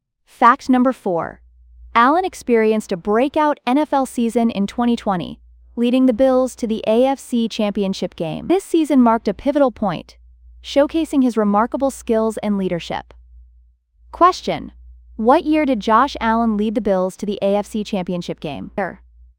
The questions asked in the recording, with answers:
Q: what year did Josh Allen lead the Bills to the AFC Championship game?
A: 2020.